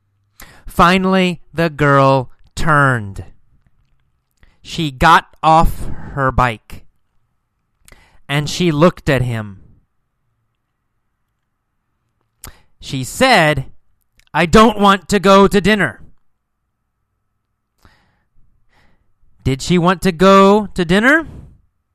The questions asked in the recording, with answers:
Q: Did she want to go to dinner?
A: No.